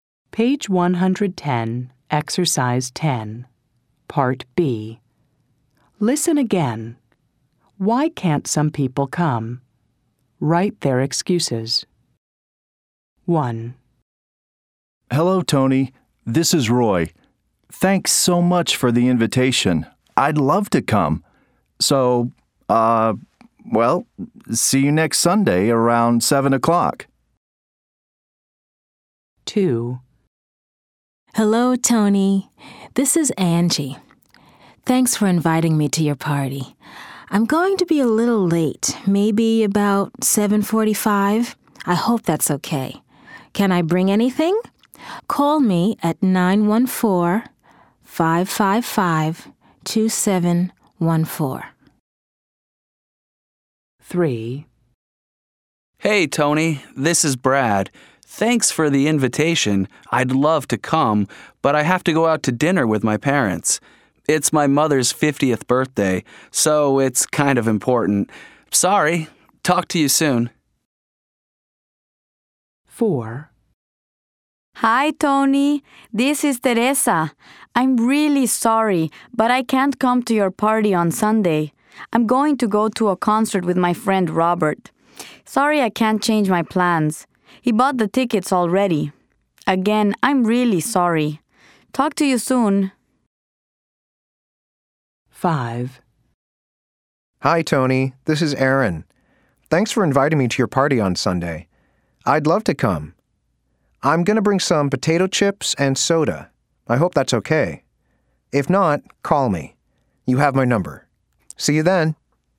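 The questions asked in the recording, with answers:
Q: Why can't some people come?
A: Brad has to go out to dinner with his parents for his mother's 50th birthday.

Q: Why can't some people come?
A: Teresa is going to a concert with her friend Robert, who already bought the tickets.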